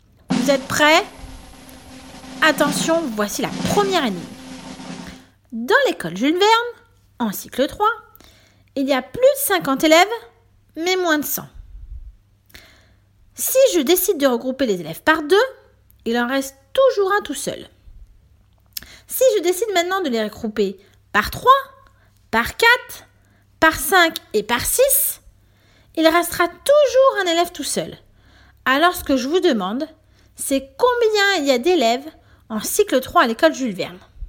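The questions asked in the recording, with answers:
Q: Alors ce que je vous demande, c'est combien il y a d'élèves en cycle 3 à l'école Jules Verne.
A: 61 élèves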